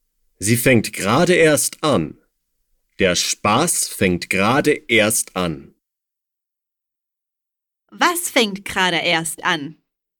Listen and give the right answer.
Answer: Der Spaß. Der Spaß fängt gerade erst an.